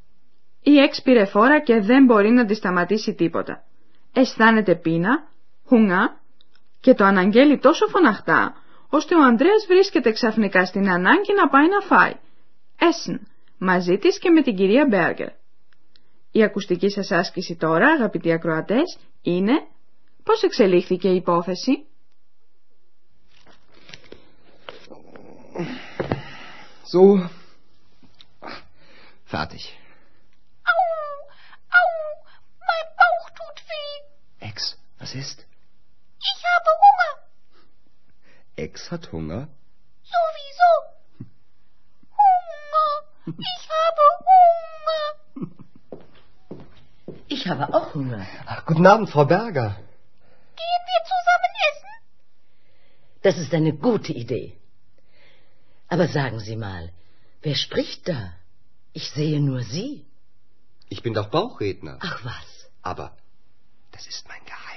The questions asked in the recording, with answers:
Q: Η ακουστική σας άσκηση τώρα, αγαπητοί ακροατές, είναι πώς εξελίχθηκε η υπόθεση.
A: Η υπόθεση συνέβη πολύ απλά και γρήγορα.